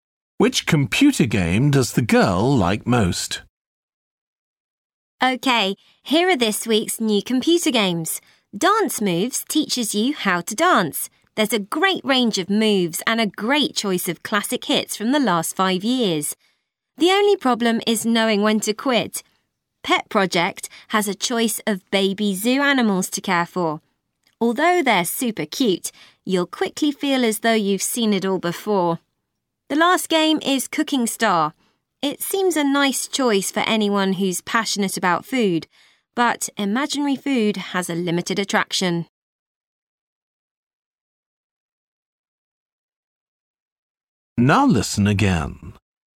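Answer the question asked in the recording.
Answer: Dance Moves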